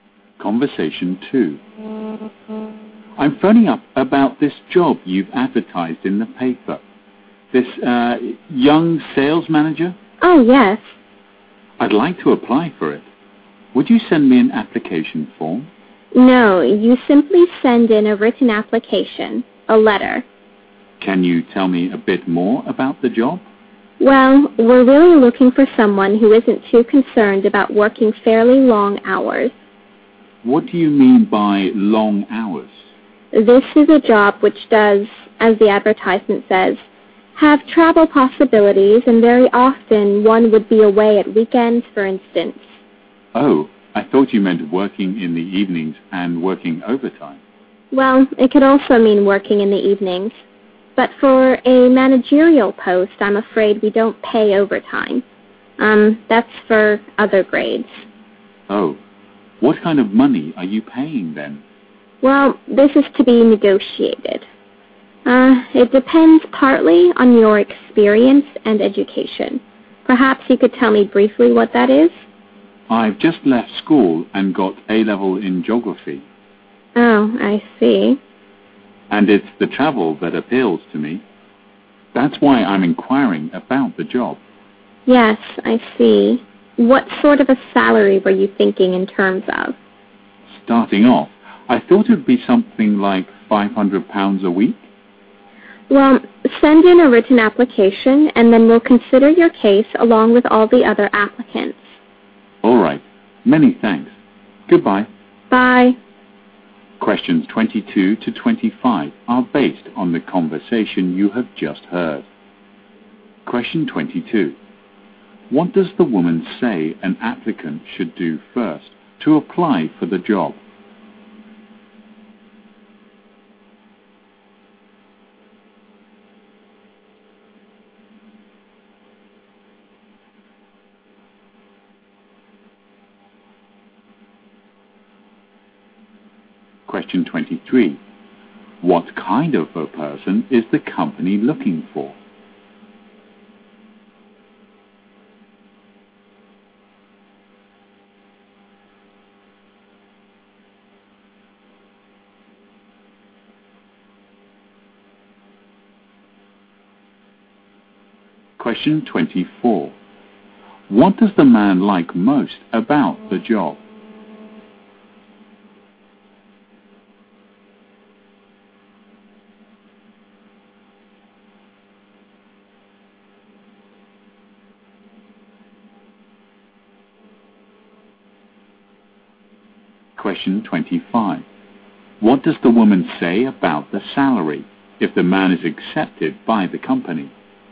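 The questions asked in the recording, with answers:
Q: What does the woman say an applicant should do first to apply for the job?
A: Send in a written application (a letter).

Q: What kind of a person is the company looking for?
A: Someone who doesn't mind working long hours.

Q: What does the man like most about the job?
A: The chance to travel.

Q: What does the woman say about the salary if the man is accepted by the company?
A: It is to be negotiated.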